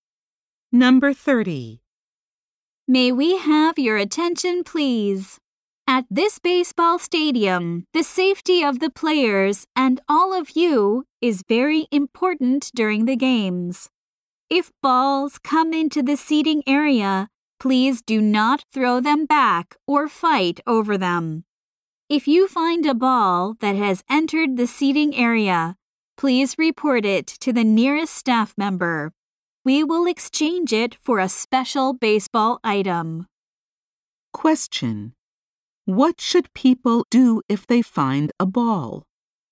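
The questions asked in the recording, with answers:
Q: What should people do if they find a ball?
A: Report it to the nearest staff member.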